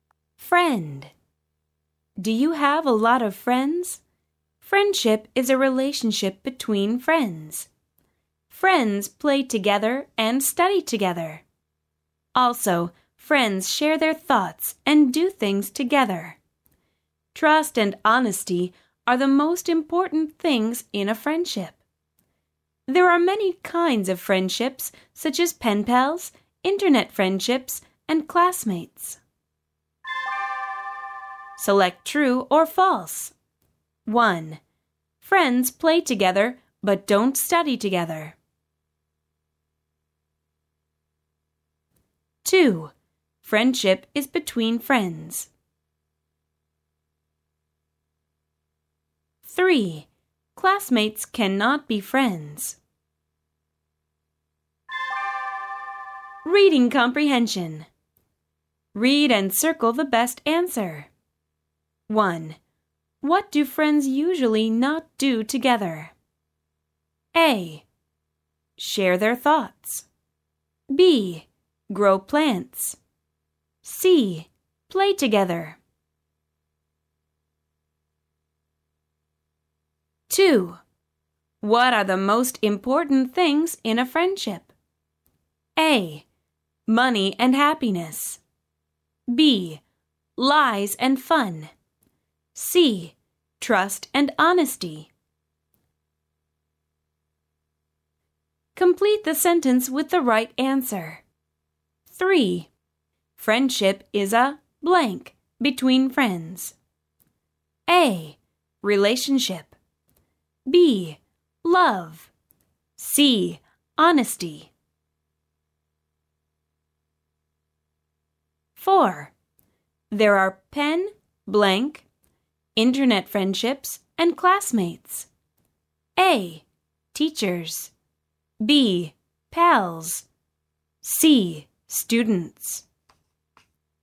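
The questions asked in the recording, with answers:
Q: Friends play together but don't study together.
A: False

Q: Friendship is between friends.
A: True

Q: Classmates cannot be friends.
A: False

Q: What do friends usually not do together?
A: B: Grow plants.

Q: What are the most important things in a friendship?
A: C: Trust and honesty.

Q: Friendship is a blank between friends.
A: A: Relationship.

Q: There are pen, blank, internet friendships, and classmates.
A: B: Pals.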